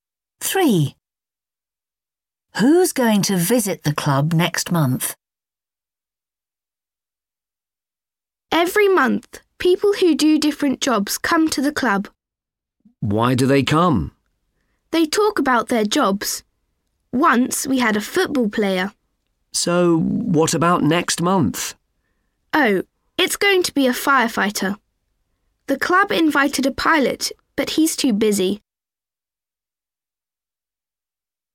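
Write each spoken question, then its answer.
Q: Who's going to visit the club next month?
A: a firefighter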